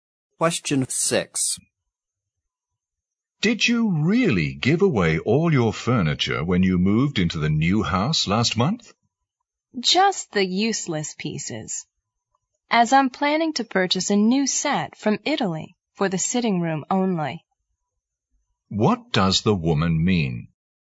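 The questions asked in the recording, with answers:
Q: What does the woman mean?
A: She gave away only the useless furniture and plans to buy a new set from Italy for the sitting room.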